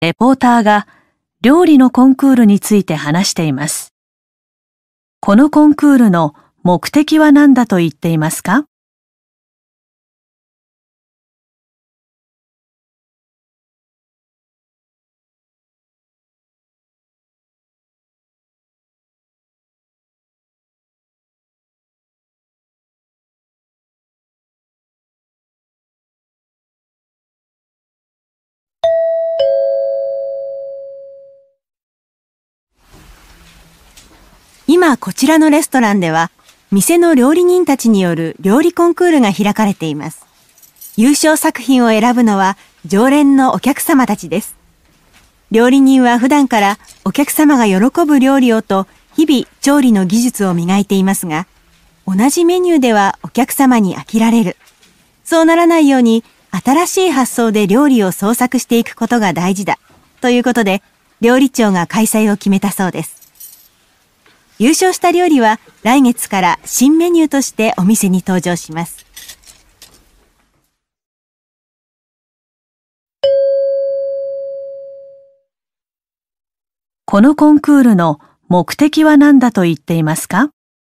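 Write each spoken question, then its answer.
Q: このコンクールの目的は何だと言っていますか?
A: 客に飽きられないよう、新しい発想で料理を創作すること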